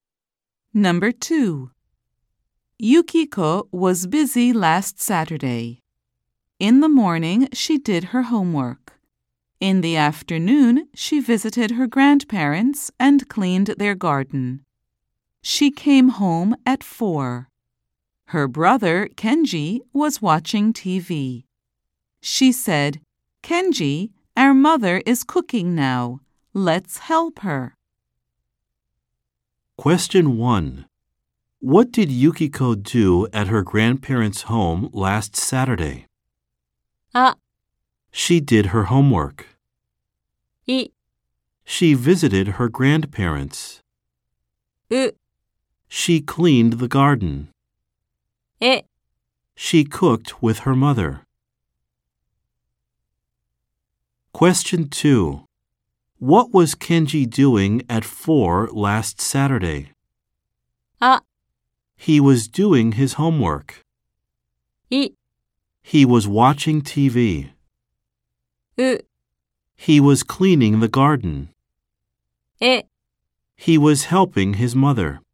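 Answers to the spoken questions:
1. う: She cleaned the garden.
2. い: He was watching TV.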